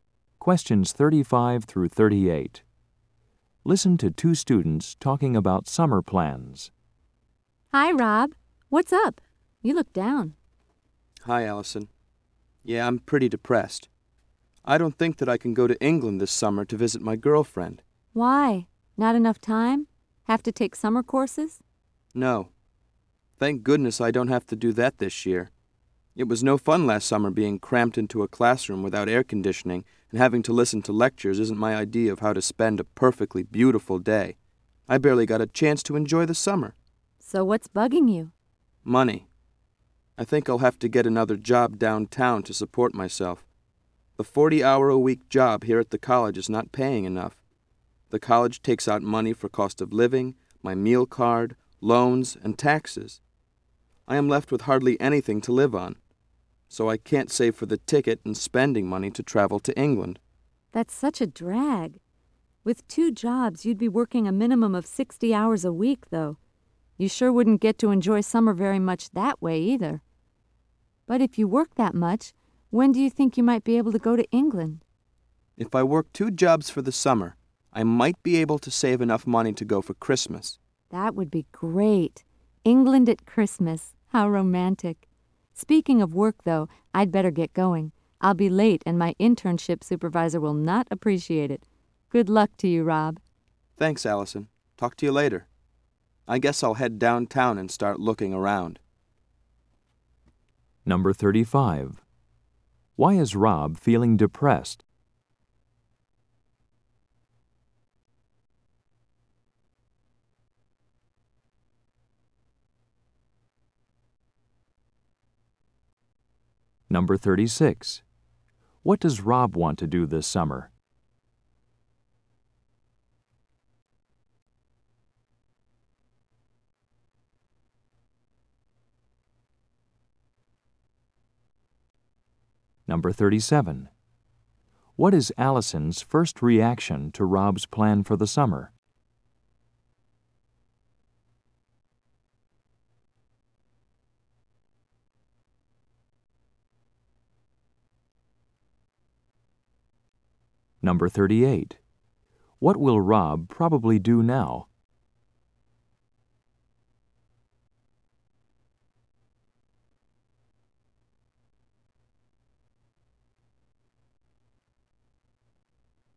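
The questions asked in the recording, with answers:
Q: Why is Rob feeling depressed?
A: He doesn't have enough money to go to England to visit his girlfriend

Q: What does Rob want to do this summer?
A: Go to England to visit his girlfriend

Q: What will Rob probably do now?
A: Go downtown to look for another job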